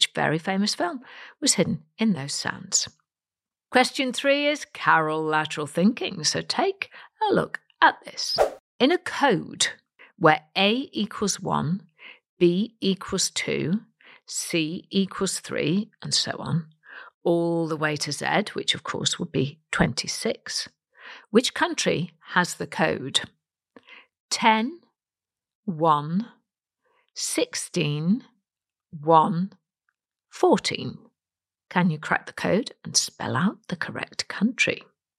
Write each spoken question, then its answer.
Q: In a code where A equals 1, B equals 2, C equals 3, and so on, all the way to Z, which of course would be 26, which country has the code 10, 1, 16, 1, 14?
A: Put it together, you get the word Japan, J-A-P-A-N, so well done if you worked that one out.